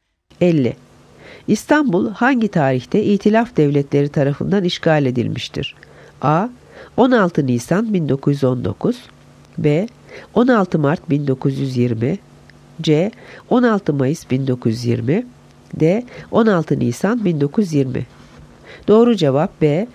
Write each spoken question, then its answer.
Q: İstanbul hangi tarihte İtilaf Devletleri tarafından işgal edilmiştir?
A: Doğru cevap B. 16 Mart 1920